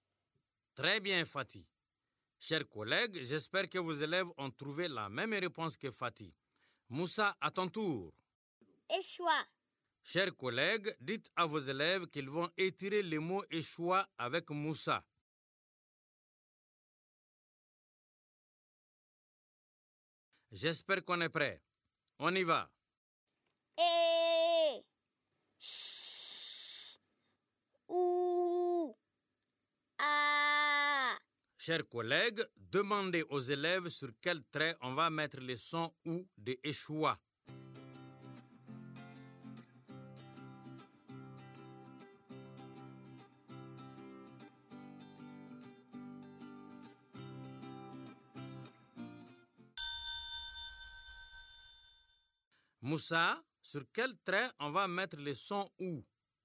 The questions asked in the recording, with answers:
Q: Moussa, sur quel trait on va mettre le son « ou »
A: Monsieur, on va mettre le son « ou » sur le troisième trait.